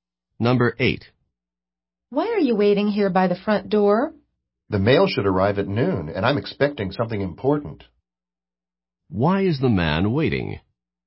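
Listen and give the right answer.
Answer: He is expecting something important in the mail, which should arrive at noon.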